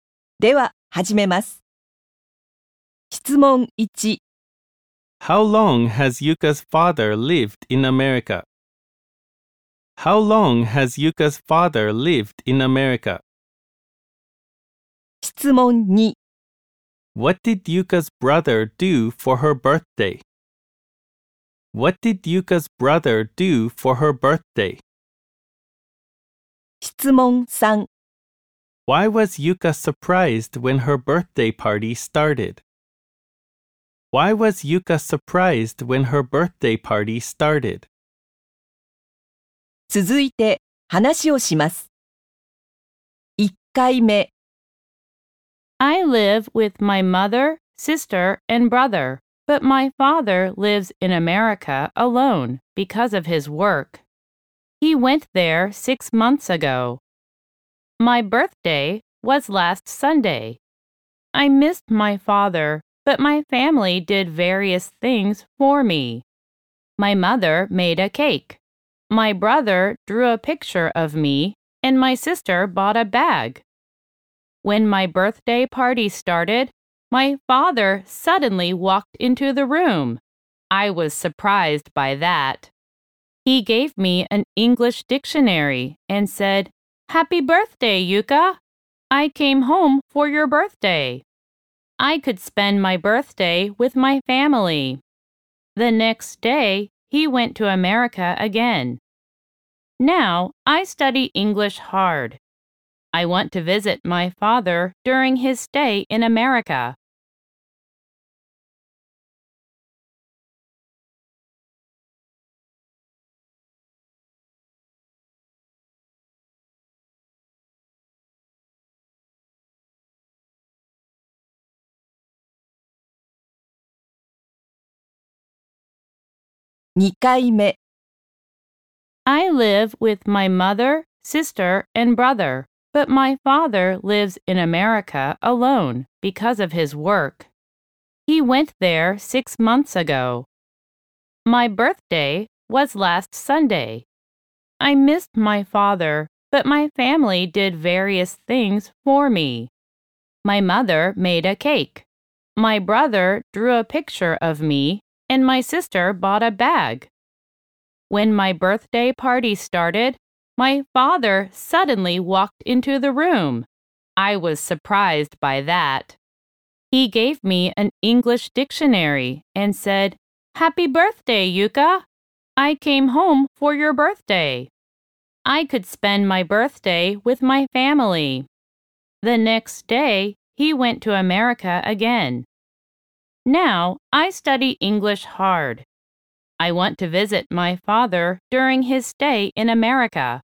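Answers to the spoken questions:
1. For 6 months.
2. He drew a picture of her.
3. Because her father suddenly walked into the room.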